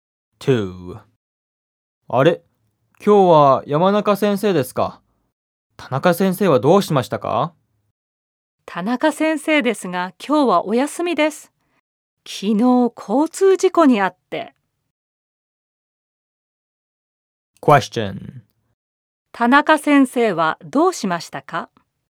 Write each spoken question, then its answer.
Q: 田中先生はどうしましたか?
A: 交通事故にあったらしいです。